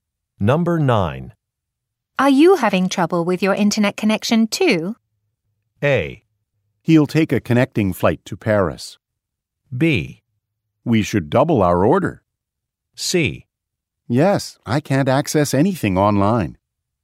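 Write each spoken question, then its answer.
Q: Are you having trouble with your internet connection, too?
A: C: Yes, I can't access anything online.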